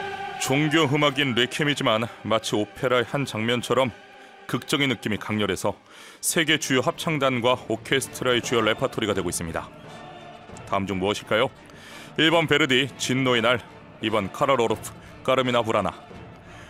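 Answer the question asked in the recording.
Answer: 1: 베르디, 진노의 날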